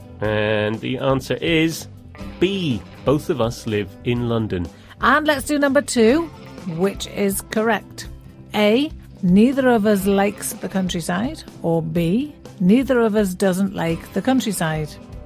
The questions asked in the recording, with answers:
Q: Which is correct?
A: Ooh, well, this one is A, neither of us likes the countryside.